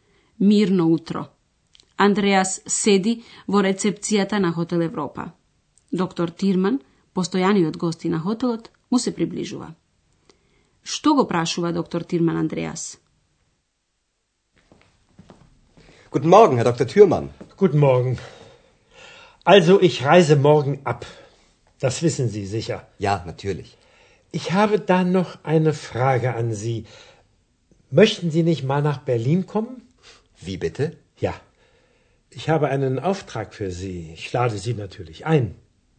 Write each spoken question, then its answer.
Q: Што го прашува доктор Тирман Андреас?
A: Доктор Тирман ќе патува и го прашува Андреас дали би сакал да дојде во Берлин.